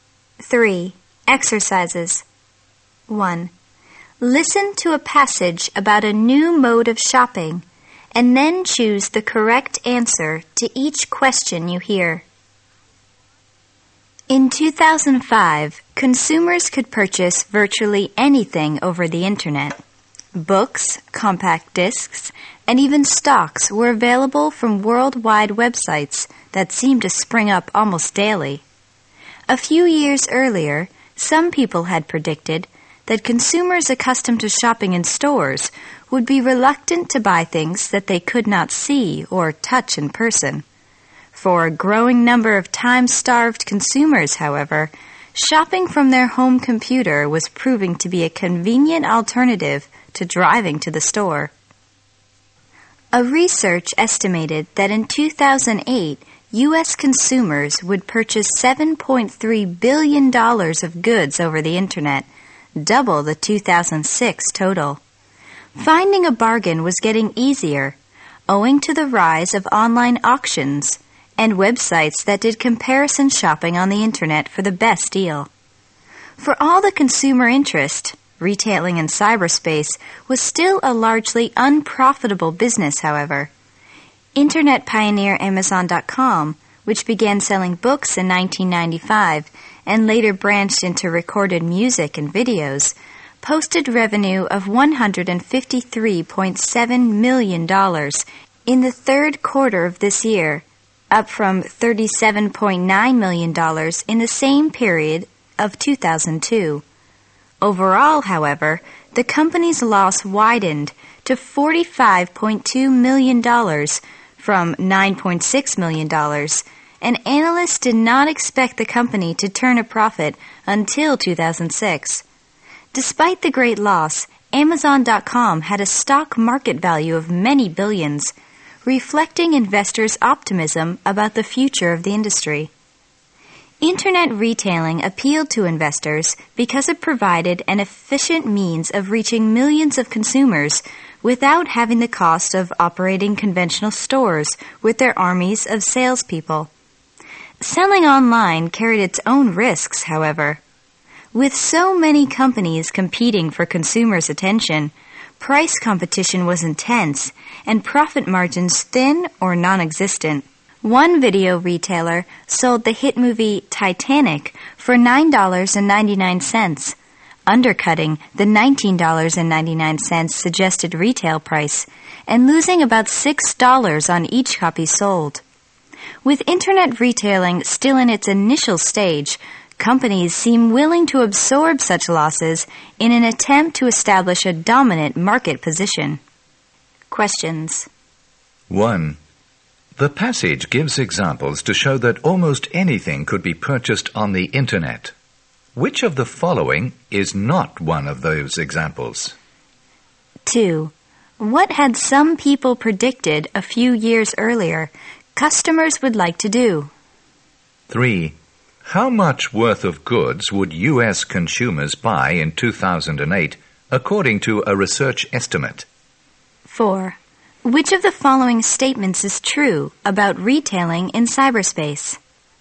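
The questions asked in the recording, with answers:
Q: What had some people predicted a few years earlier?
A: That consumers would be reluctant to buy things they could not see or touch in person

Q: How much worth of goods would U.S. consumers buy in 2008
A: $7.3 billion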